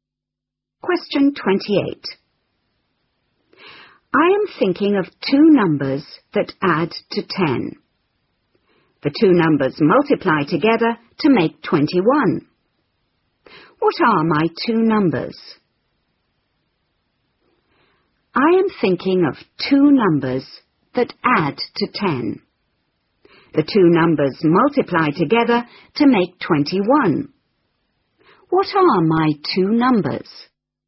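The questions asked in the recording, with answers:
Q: What are my two numbers?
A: 3 and 7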